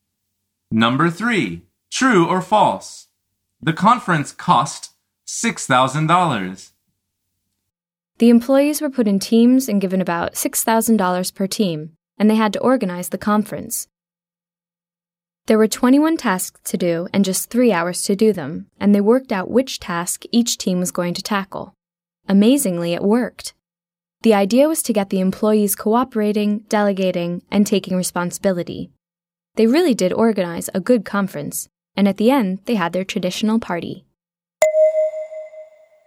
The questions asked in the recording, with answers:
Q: true or false? The conference cost $6,000.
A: The answer is false. Each team was given about $6,000 to spend.